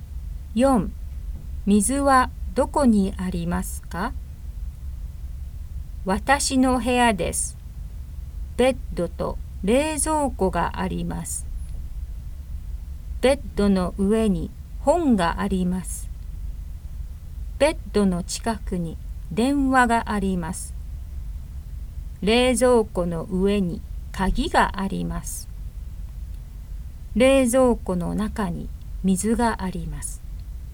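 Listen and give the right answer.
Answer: 冷蔵庫の中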